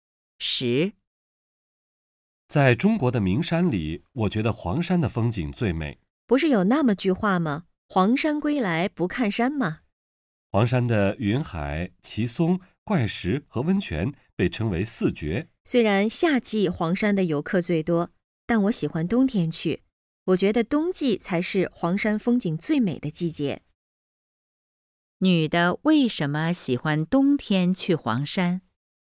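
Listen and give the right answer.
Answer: 她觉得冬季是黄山风景最美的季节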